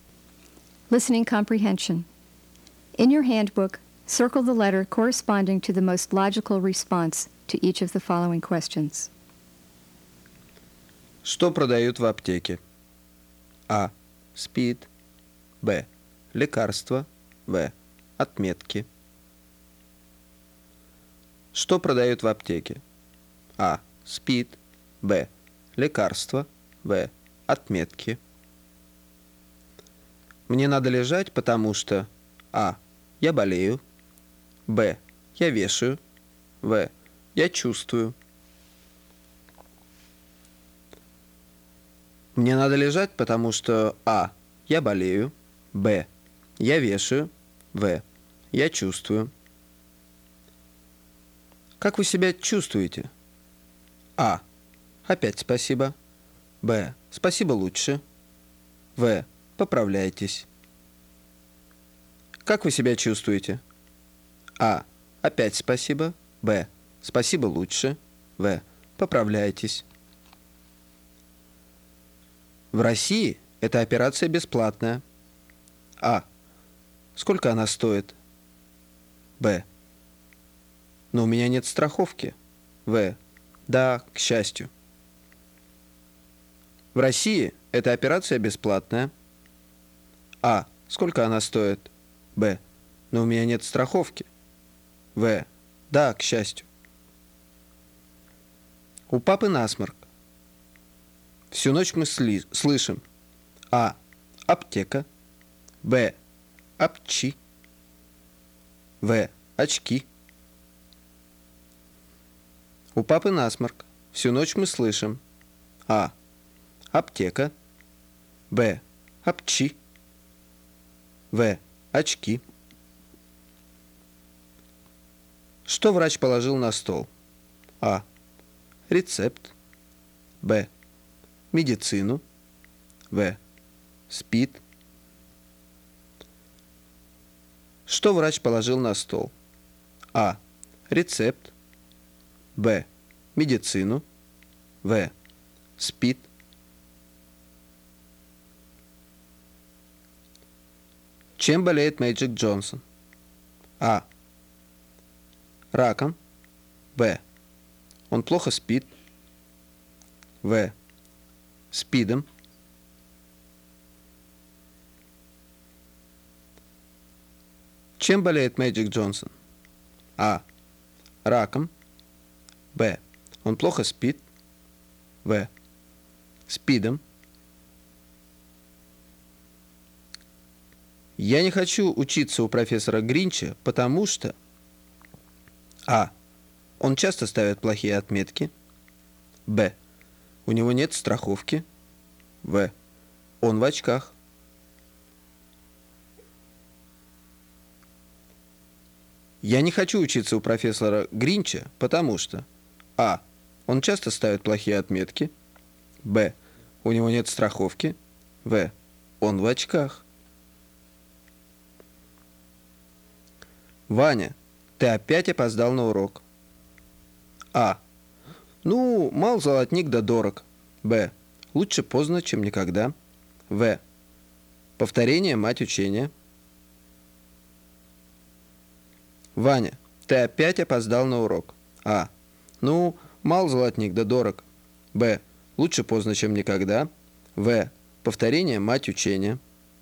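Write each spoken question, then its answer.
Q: Что продают в аптеке?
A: Б: Лекарства.

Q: Мне надо лежать, потому что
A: А: Я болею.

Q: Как вы себя чувствуете?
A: Б: Спасибо лучше.

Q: У папы насморк. Всю ночь мы слышим:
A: Б: Апчи.

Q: Что врач положил на стол?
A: А: Рецепт.

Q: Чем болеет Мэджик Джонсон?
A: В: СПИДом.

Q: Я не хочу учиться у профессора Гринча, потому что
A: А: Он часто ставит плохие отметки.

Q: Ваня, ты опять опоздал на урок.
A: Б: Лучше поздно, чем никогда.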